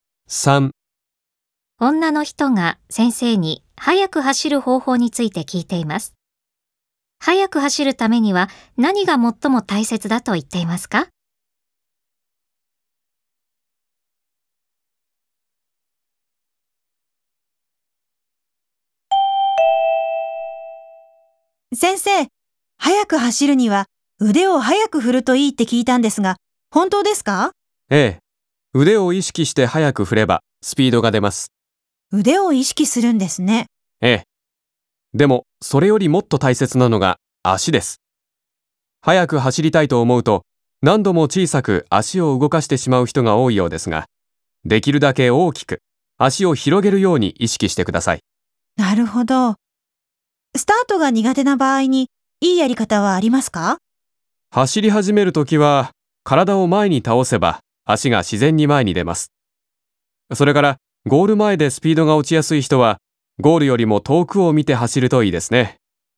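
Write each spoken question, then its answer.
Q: 速く走るためには何が最も大切だと言っていますか?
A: できるだけ大きく足を広げること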